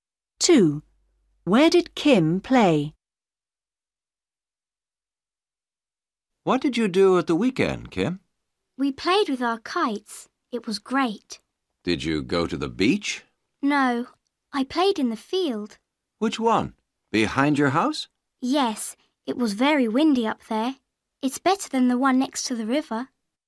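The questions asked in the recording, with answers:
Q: Where did Kim play?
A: In the field behind her house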